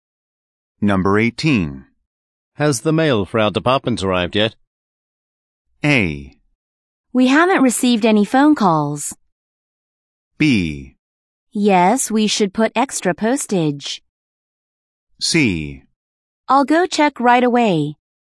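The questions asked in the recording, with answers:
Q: Has the mail for our department arrived yet?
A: C: I'll go check right away.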